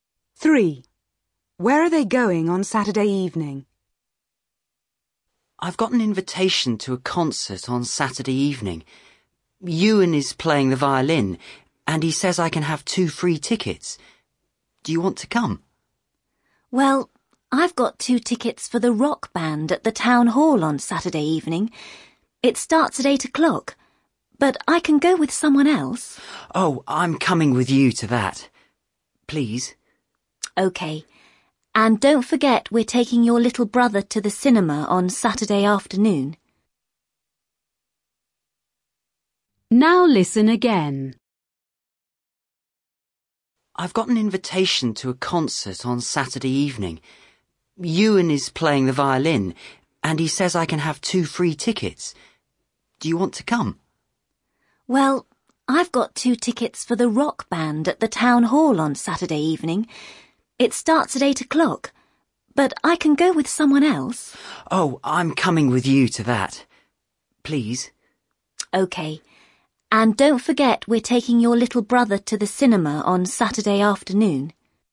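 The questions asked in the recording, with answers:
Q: Where are they going on Saturday evening?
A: To the rock band concert at the town hall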